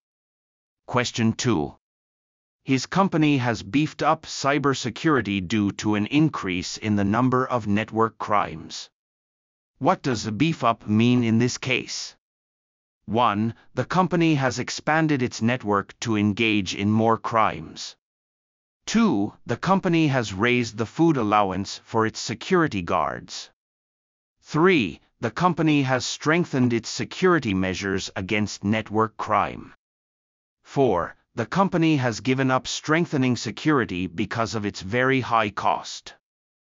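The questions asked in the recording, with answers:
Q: What does a beef up mean in this case?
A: 3: The company has strengthened its security measures against network crime.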